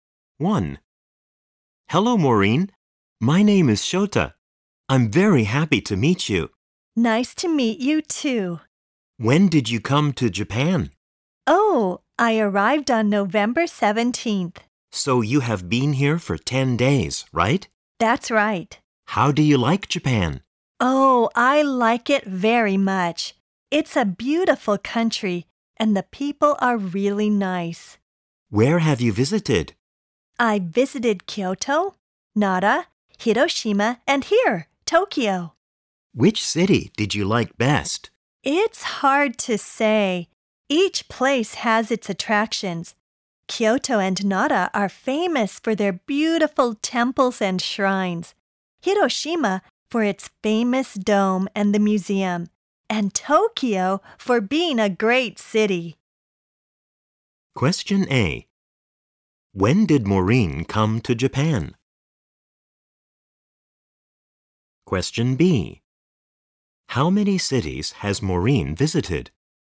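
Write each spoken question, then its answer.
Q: When did Maureen come to Japan?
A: On November 17th

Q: How many cities has Maureen visited?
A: Four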